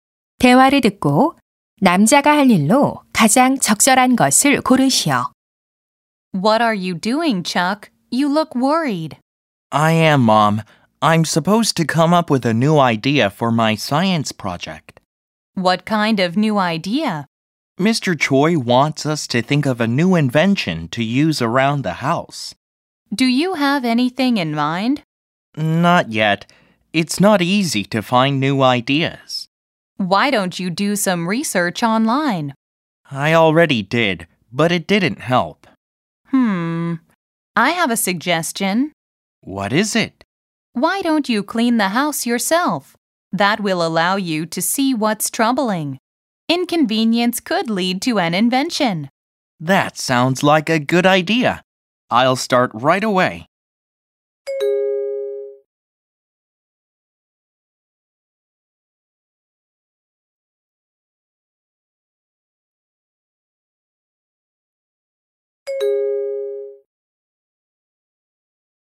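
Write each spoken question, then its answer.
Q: 7번 대화를 듣고 남자가 할 일로 가장 적절한 것을 고르시오.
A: 집 청소하기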